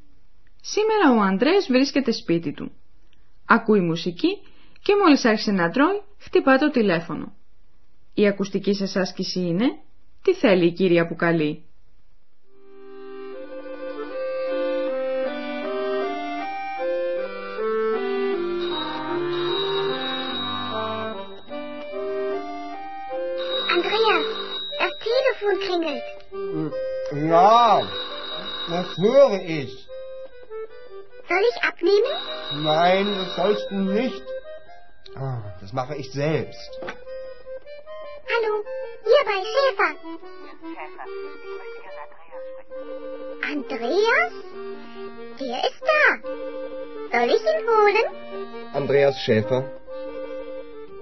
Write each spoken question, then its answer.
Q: Τι θέλει η κυρία που καλεί?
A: Η Καλούσα θέλει να μιλήσει στον Ανδρέα.